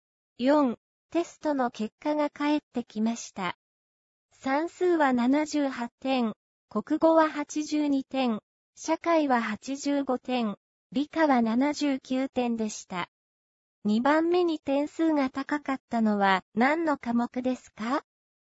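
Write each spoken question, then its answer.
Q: 2番目に点数が高かったのは何の科目ですか?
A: 国語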